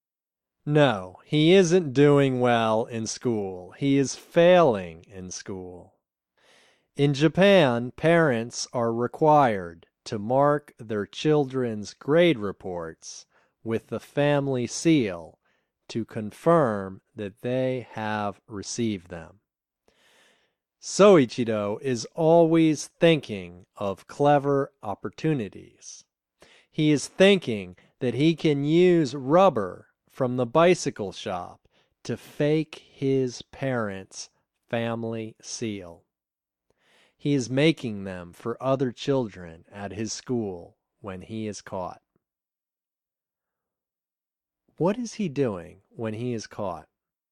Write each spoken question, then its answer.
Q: What is he doing when he is caught?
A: He is making family seals when he is caught.